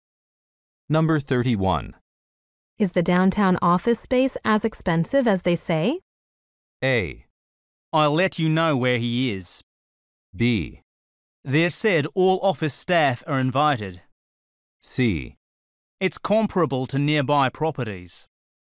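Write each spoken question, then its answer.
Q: Is the downtown office space as expensive as they say?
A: C: It's comparable to nearby properties.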